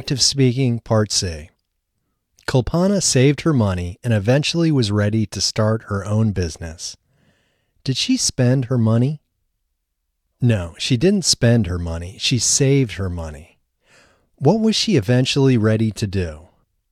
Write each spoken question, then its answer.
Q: What was she eventually ready to do?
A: She eventually was ready to start her own business.